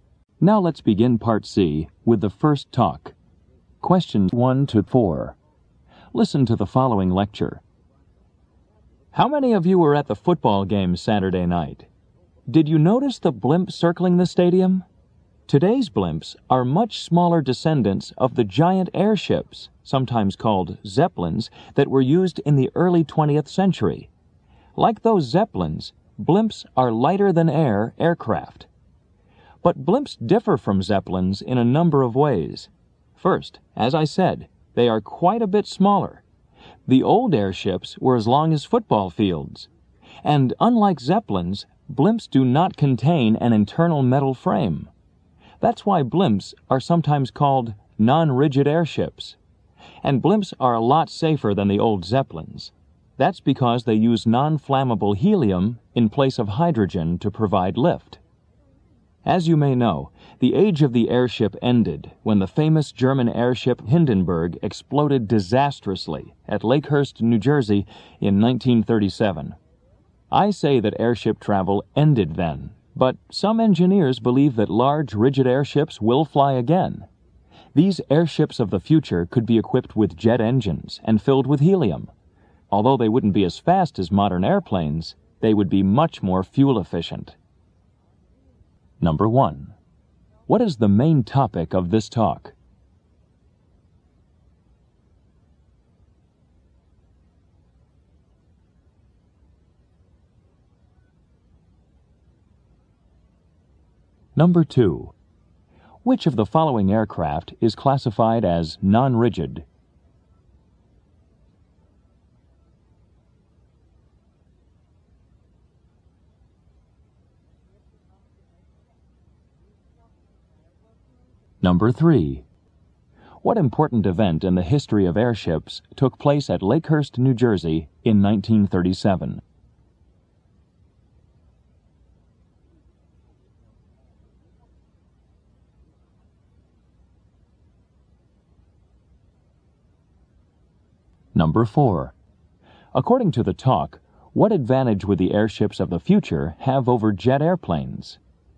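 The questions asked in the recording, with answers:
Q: What is the main topic of this talk?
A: Blimps and airships.

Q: Which of the following aircraft is classified as non-rigid?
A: A blimp.

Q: What important event in the history of airships took place at Lakehurst, New Jersey in 1937?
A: The Hindenburg exploded.

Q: According to the talk, what advantage would the airships of the future have over jet airplanes?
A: They would be more fuel efficient.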